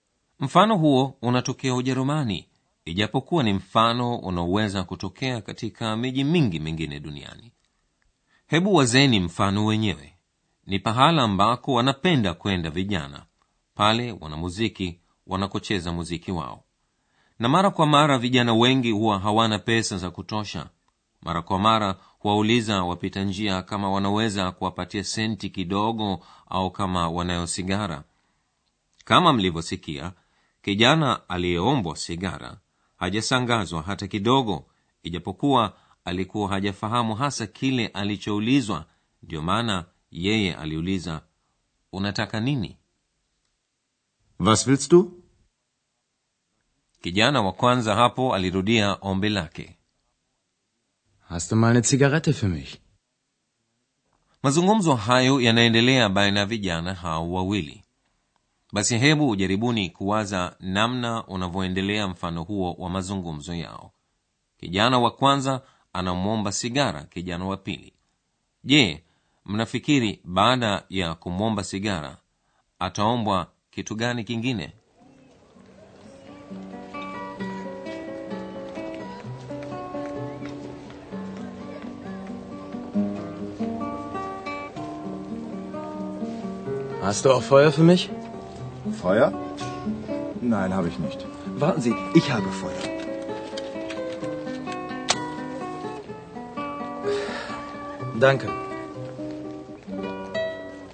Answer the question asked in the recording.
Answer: ukitaka kuvuta sigara unahitaji moto